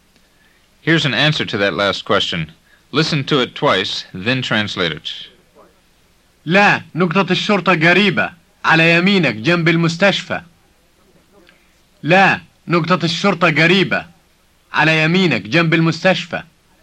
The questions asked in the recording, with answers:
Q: Listen to it twice, then translate it.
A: It means, no, the police station is nearby, on your right, next to the hospital.